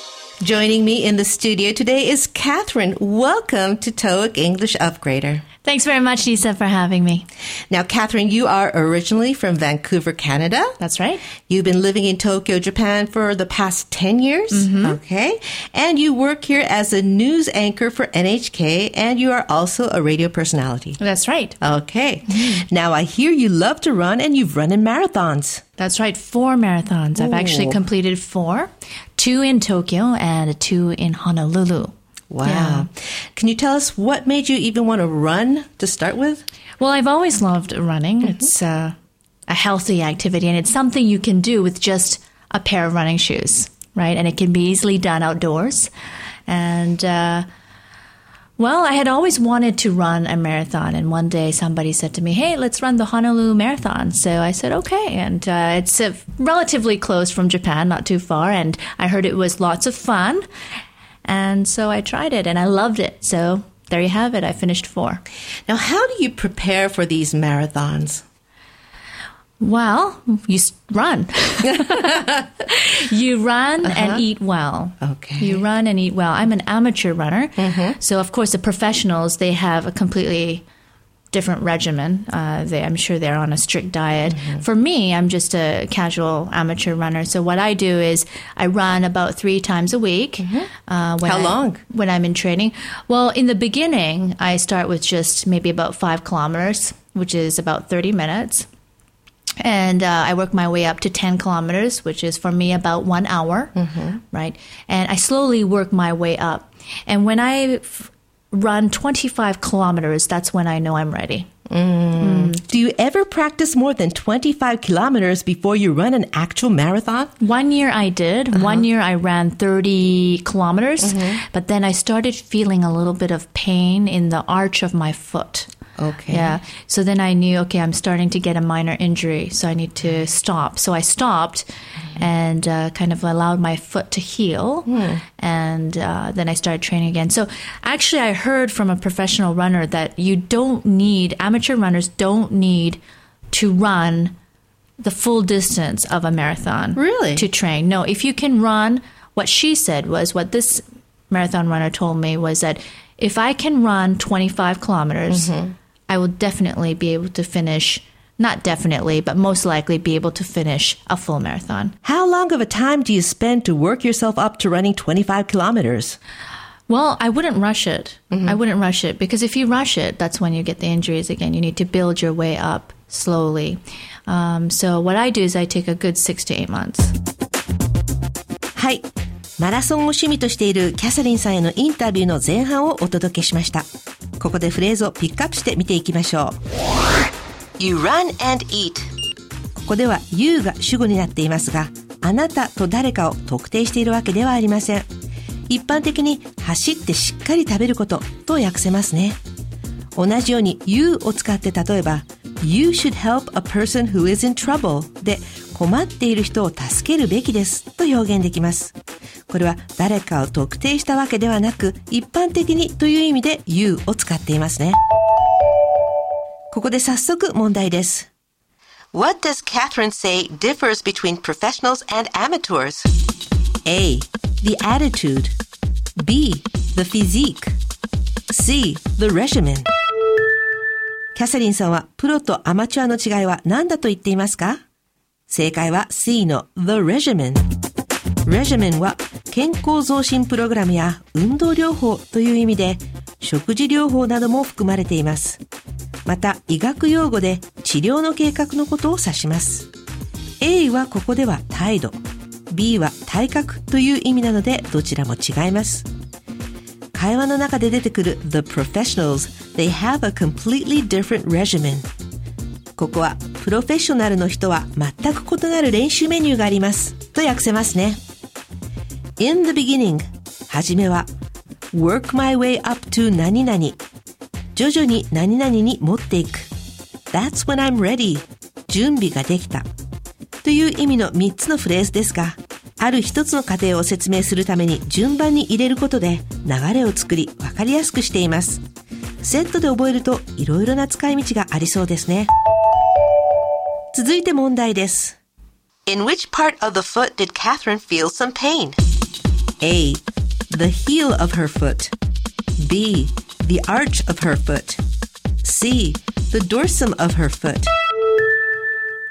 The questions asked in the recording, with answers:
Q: In which part of the foot did Catherine feel some pain?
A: 正解は B の土踏まず。